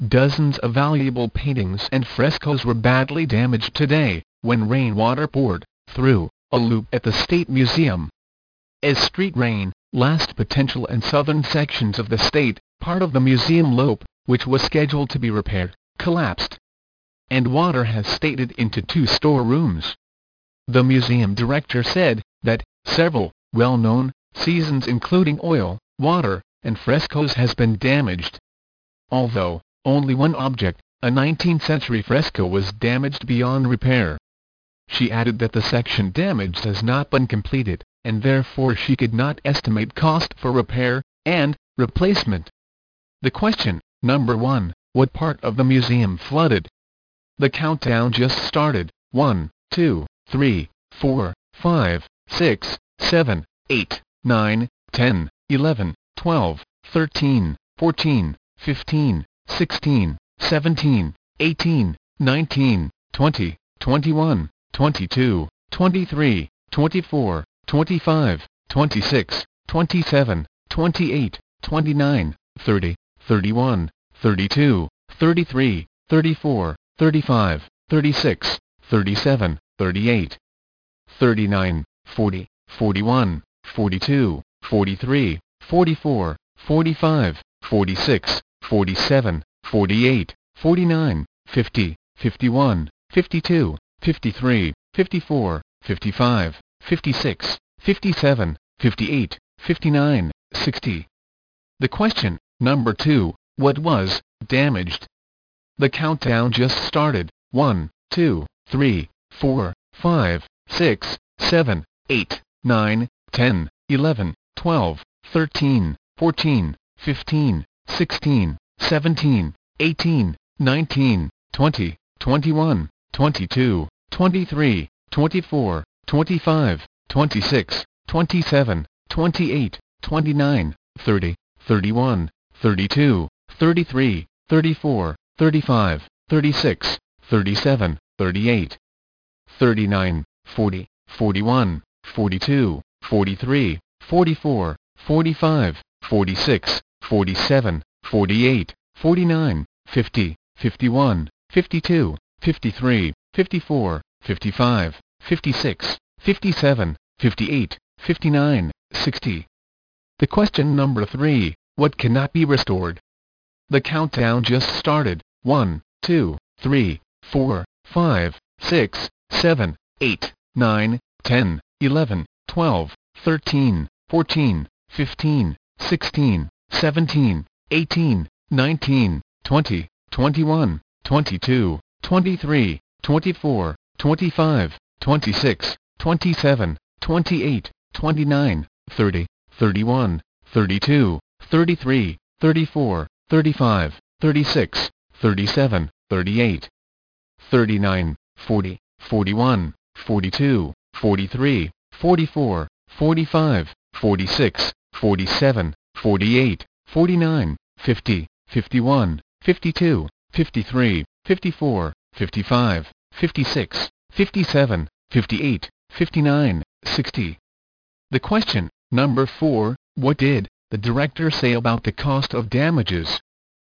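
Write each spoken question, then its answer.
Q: what part of the museum flooded?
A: Two storerooms

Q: what was damaged?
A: Dozens of valuable paintings and frescoes

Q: what cannot be restored?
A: A 19th century fresco

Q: what did the director say about the cost of damages?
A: She could not estimate it yet because the survey of the damage was not complete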